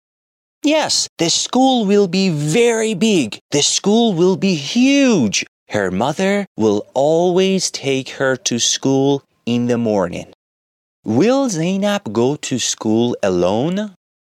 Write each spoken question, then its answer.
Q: Will Zainab go to school alone?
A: No. Zainab will go to school with her mother.